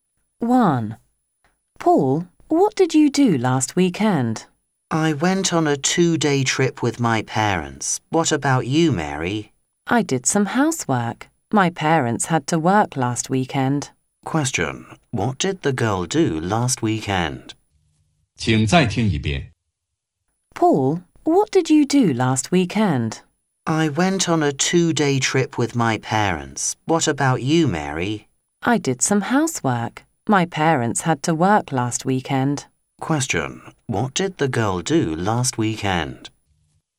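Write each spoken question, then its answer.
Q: What did the girl do last weekend?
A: She did some housework.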